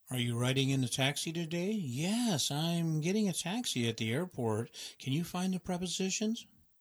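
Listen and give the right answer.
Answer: in, at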